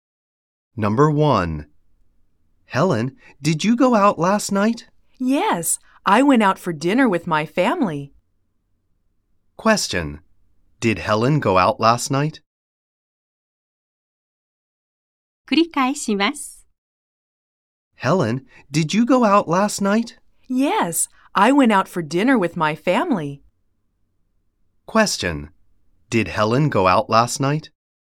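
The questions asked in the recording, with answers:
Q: Did Helen go out last night?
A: Yes, she did.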